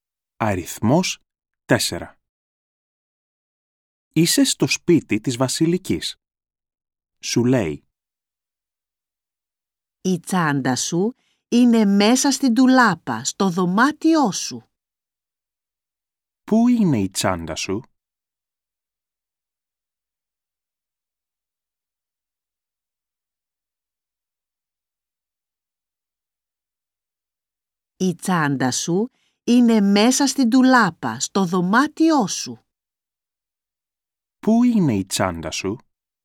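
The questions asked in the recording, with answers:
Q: Πού είναι η τσάντα σου?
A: Μέσα στην ντουλάπα, στο δωμάτιό σου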